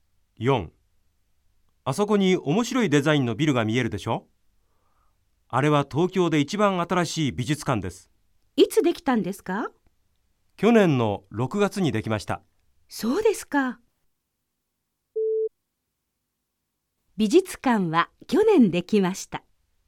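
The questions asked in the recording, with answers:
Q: 美術館は去年できました。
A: ○(正しい)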